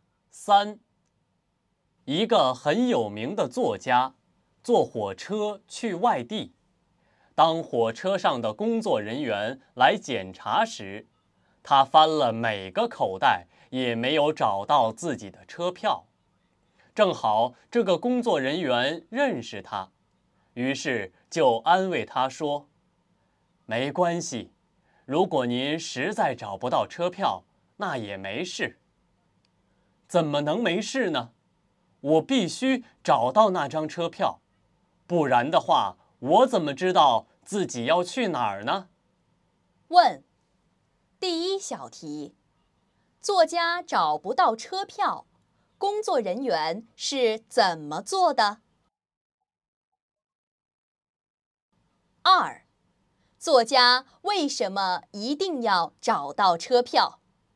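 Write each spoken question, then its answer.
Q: 作家找不到车票,工作人员是怎么做的?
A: 安慰他,说找不到也没事

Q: 作家为什么一定要找到车票?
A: 不然不知道自己要去哪儿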